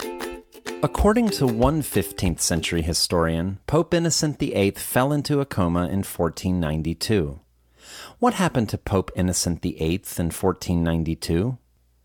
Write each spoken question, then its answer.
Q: What happened to Pope Innocent VIII in 1492?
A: In 1492, Pope Innocent VIII fell into a coma.